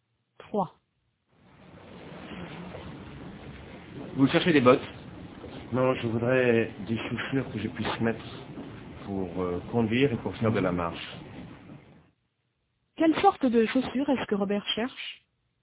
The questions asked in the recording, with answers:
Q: Quelle sorte de chaussures est-ce que Robert cherche ?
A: Des chaussures qu'il puisse mettre pour conduire et pour faire de la marche.